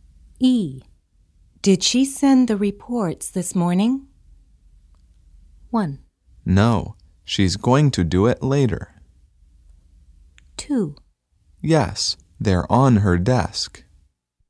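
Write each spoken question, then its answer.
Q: Did she send the reports this morning?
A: 1: No, she's going to do it later.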